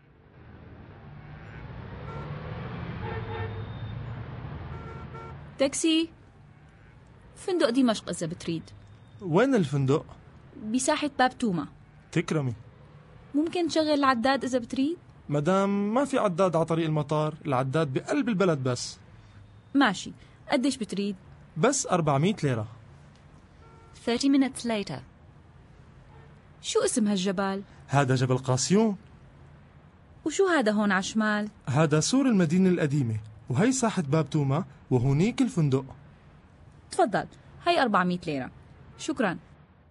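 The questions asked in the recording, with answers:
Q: What is the price?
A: 400 lira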